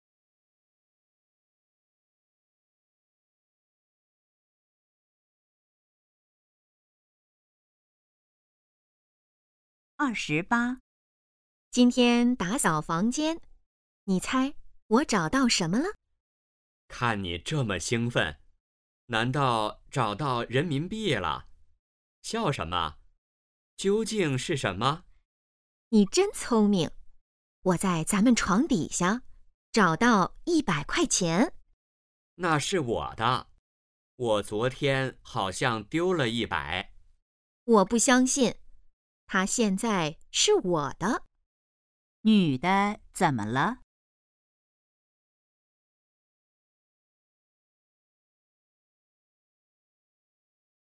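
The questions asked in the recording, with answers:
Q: 女的怎么了?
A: 找到了100块钱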